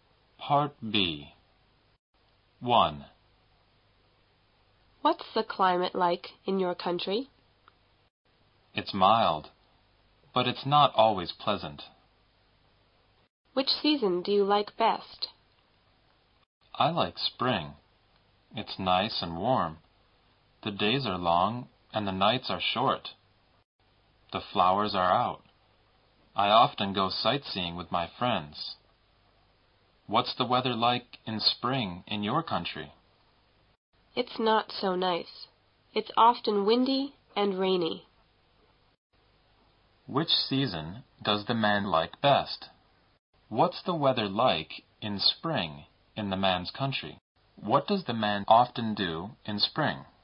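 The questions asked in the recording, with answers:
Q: Which season does the man like best?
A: Spring

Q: What's the weather like in spring in the man's country?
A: Nice and warm

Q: What does the man often do in spring?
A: Goes sightseeing with his friends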